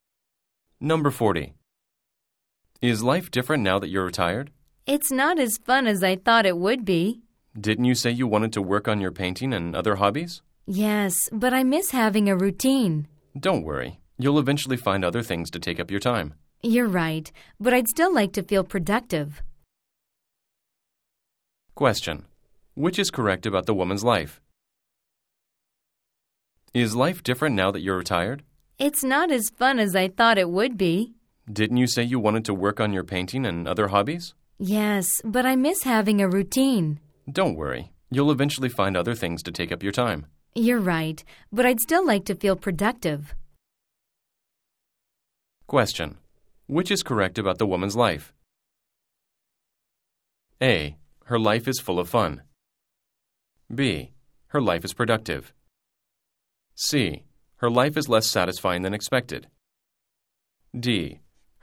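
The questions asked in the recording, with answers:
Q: Which is correct about the woman's life?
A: C: Her life is less satisfying than expected.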